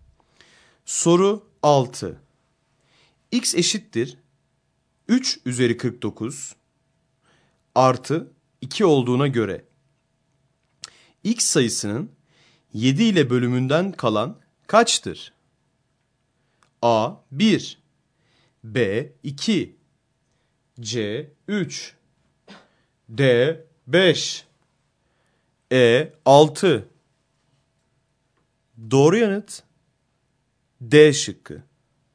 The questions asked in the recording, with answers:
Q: X eşittir 3 üzeri 49 artı 2 olduğuna göre X sayısının 7 ile bölümünden kalan kaçtır?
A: Doğru yanıt D şıkkı.